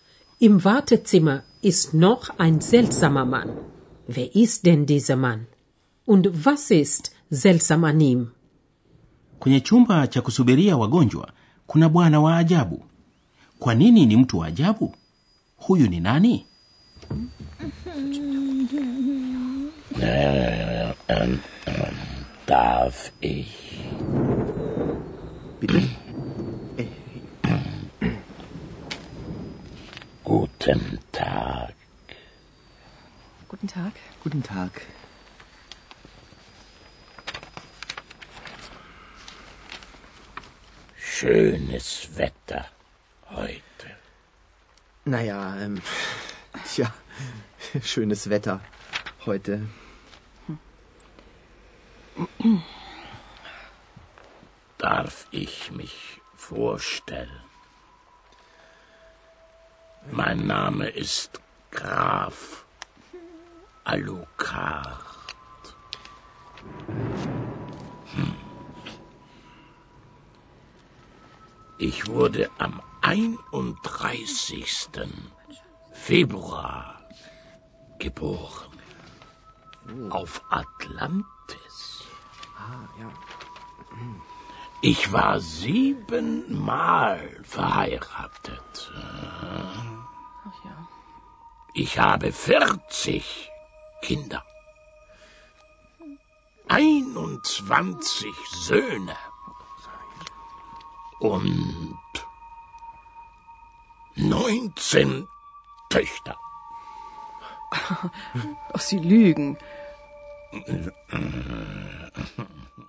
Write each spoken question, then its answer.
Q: Wer ist denn dieser Mann?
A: Alijitambulisha kwa jina la Graf Alucard.

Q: Kwa nini ni mtu wa ajabu?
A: Kwa vile anadai kuwa alizaliwa tarehe